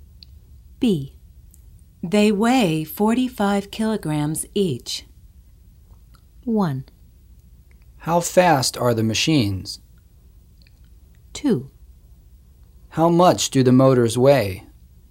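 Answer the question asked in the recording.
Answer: 2: How much do the motors weigh?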